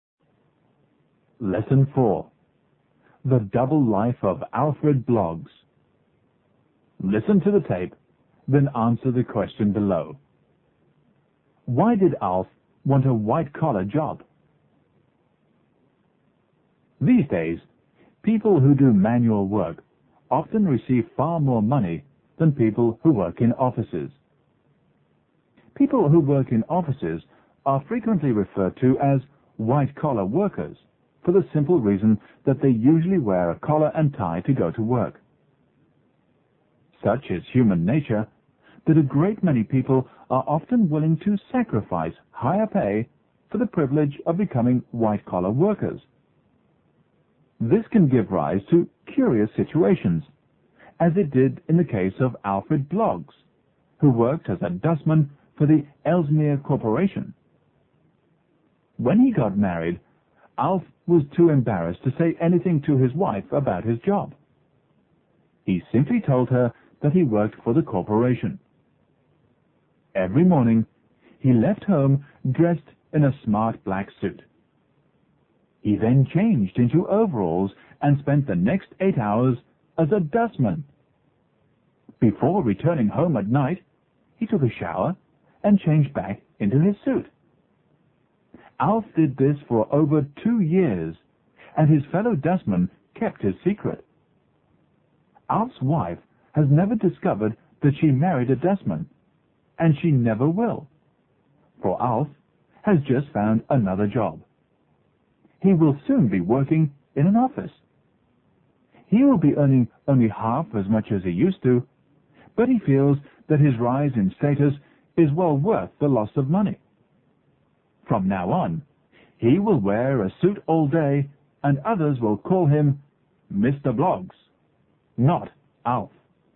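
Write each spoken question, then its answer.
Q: Why did Alf want a white-collar job?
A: He felt the rise in status was worth the loss of money (he was embarrassed to be a dustman).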